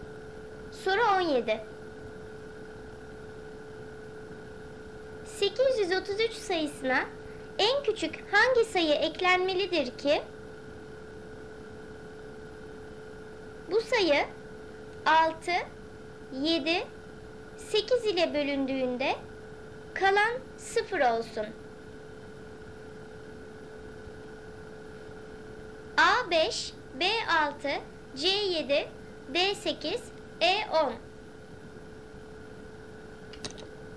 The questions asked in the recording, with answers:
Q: bu sayı 6, 7, 8 ile bölündüğünde kalan 0 olsun?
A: Doğru cevap C 7.